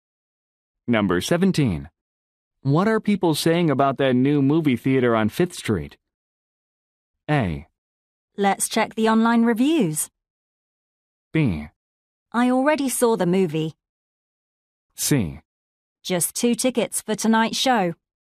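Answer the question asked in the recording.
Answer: A: Let's check the online reviews.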